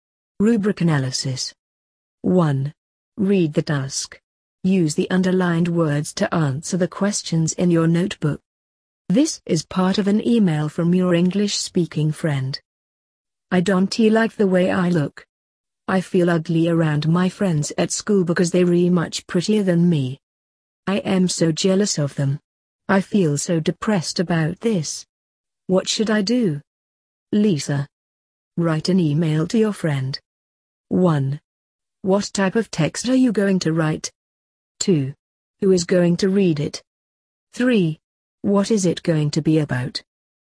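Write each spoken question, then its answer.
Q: What type of text are you going to write?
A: An email (an informal email of advice)

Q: Who is going to read it?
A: Your English-speaking friend, Lisa

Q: What is it going to be about?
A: Lisa feels ugly and jealous because her friends are prettier, and she needs advice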